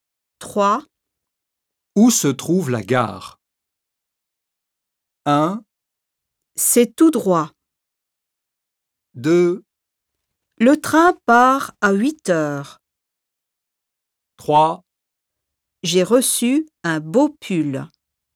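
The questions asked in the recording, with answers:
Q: Où se trouve la gare ?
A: 1: C'est tout droit.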